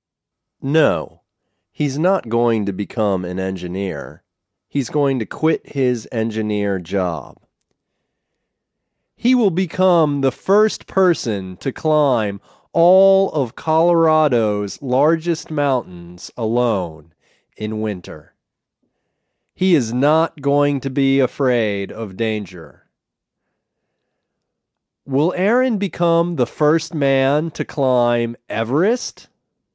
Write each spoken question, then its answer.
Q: Will Aaron become the first man to climb Everest?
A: No, he won't become the first man to climb Everest.